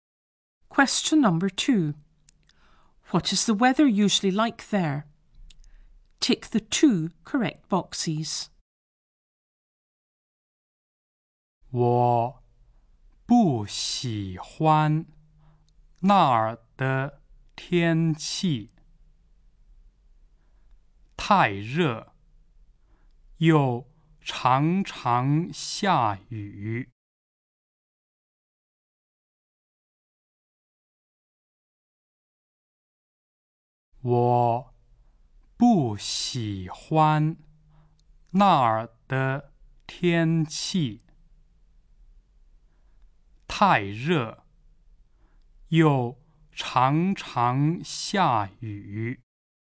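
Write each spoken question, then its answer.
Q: What is the weather usually like there?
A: Too hot and often rainy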